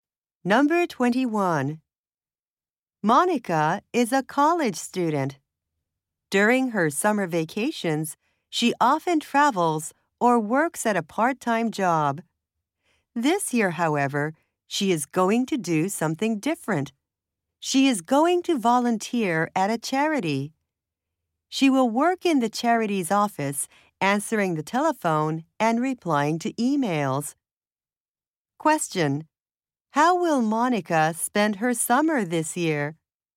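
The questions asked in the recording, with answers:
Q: How will Monica spend her summer this year?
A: She will volunteer at a charity office.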